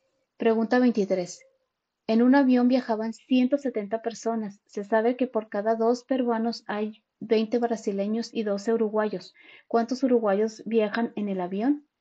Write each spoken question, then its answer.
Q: ¿Cuántos uruguayos viajan en el avión?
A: Y la respuesta correcta es la B, 60.